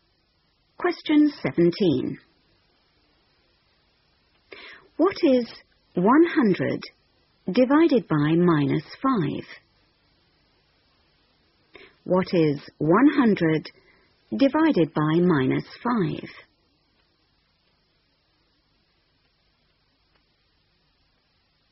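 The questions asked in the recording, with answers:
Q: What is 100 divided by minus 5?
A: -20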